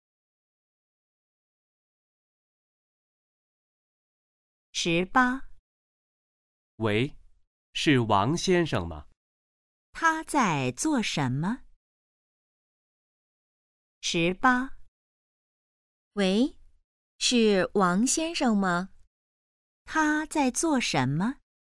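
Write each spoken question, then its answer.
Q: 他在做什么?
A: 打电话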